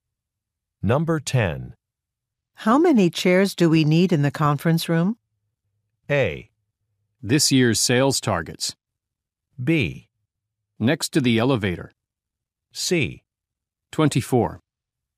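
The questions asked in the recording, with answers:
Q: How many chairs do we need in the conference room?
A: C: 24.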